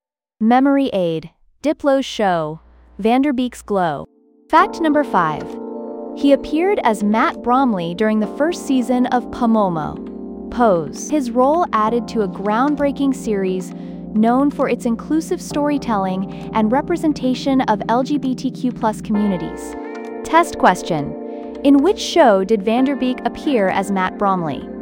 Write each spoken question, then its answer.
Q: In which show did Van Der Beek appear as Matt Bromley?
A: Correct answer. Pose.